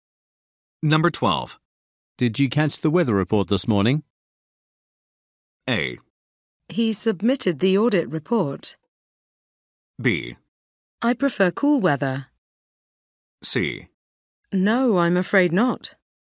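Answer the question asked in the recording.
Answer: C: No, I'm afraid not.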